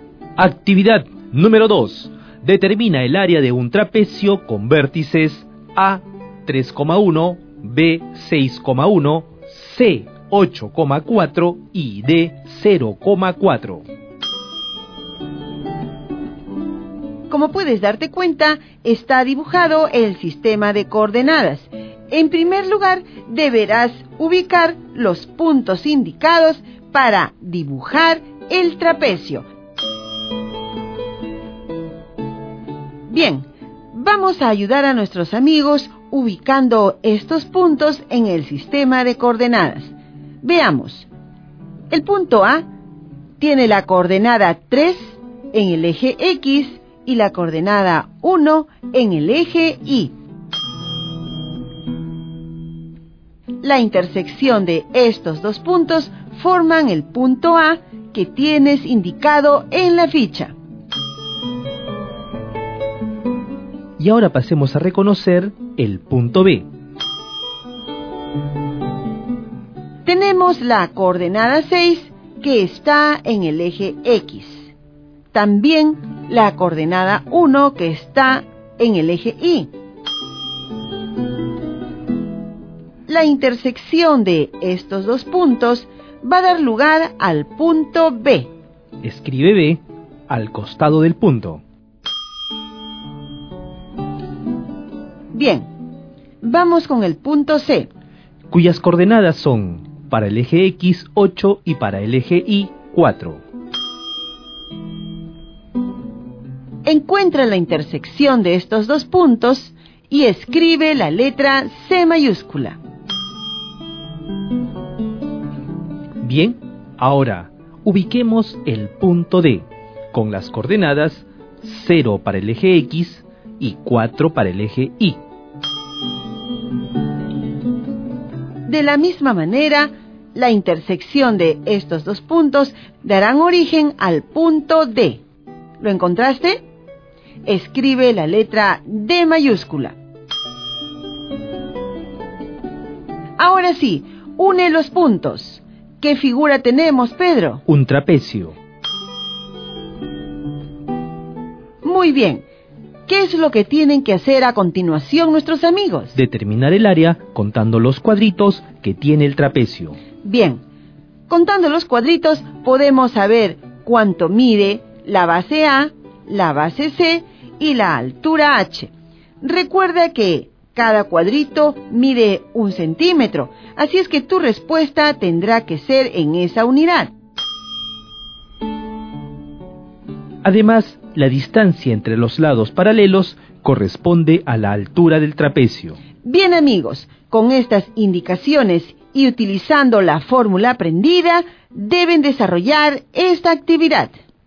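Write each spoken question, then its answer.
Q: Determina el área de un trapecio con vértices A, 3,1, B, 6,1, C, 8,4 y D, 0,4.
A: 16,5 cm2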